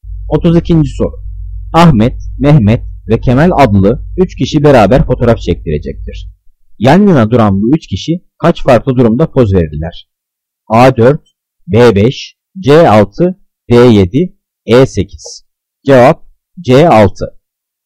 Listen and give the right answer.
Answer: Cevap C6.